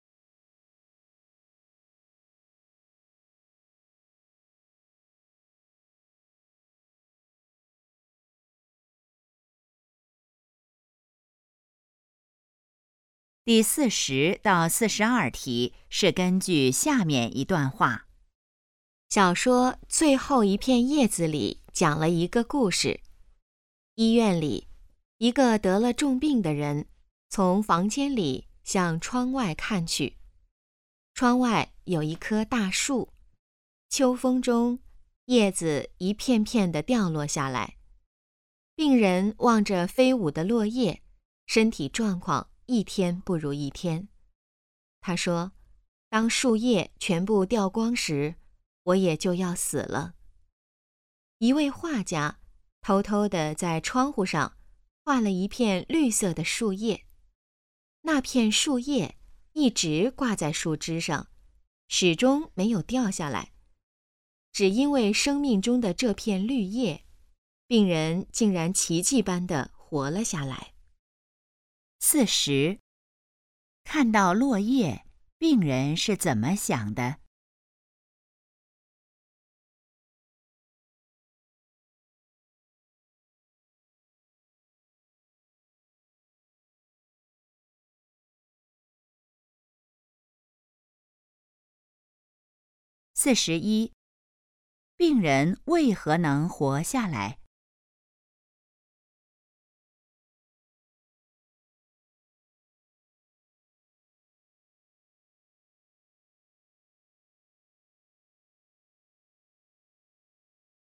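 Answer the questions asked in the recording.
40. 树叶全部掉光时自己就要死了
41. 画家在窗上画了一片不会掉的绿叶
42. 《最后一片叶子》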